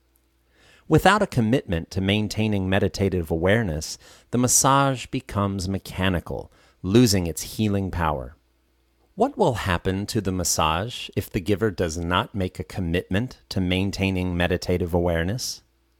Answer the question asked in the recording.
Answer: The massage will become mechanical and lose its healing power if the giver does not maintain meditative awareness.